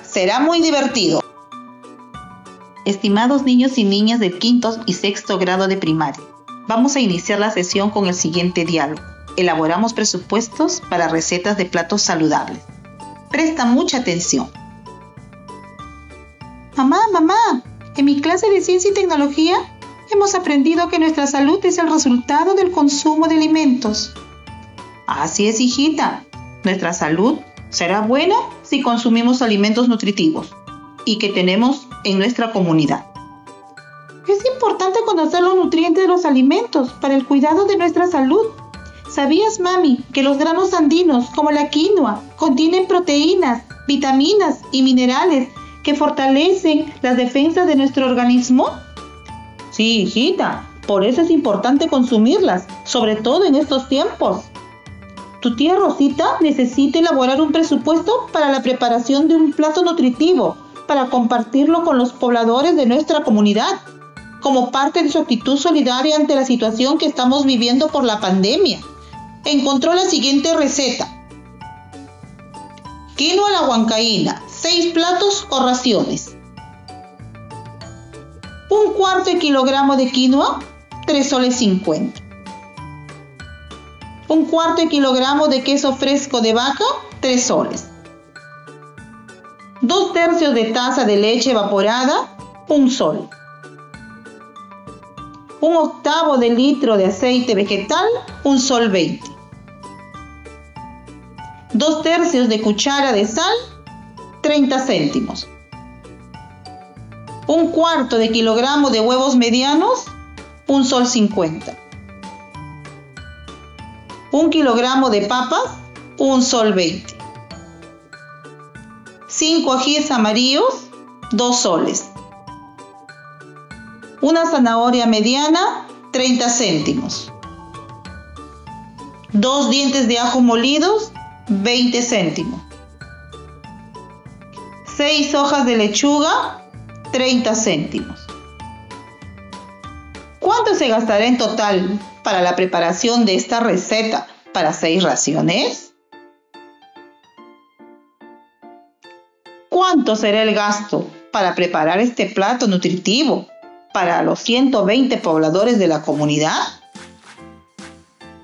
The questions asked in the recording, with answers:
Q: ¿Cuánto se gastará en total para la preparación de esta receta para seis raciones?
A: Para preparar la receta de la quinoa a la huancaína para hacer raciones, se gastará 14 soles con 50 cent.

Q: ¿Cuánto será el gasto para preparar este plato nutritivo para los 120 pobladores de la comunidad?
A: el gasto para preparar el plato nutritivo para los 120 pobladores de la comunidad será 290 soles.